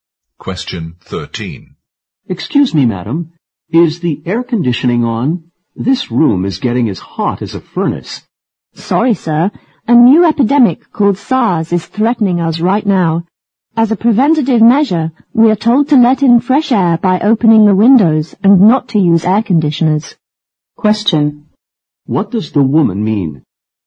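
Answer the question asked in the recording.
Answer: The air conditioning is off because they were told to open windows instead, as a precaution against SARS.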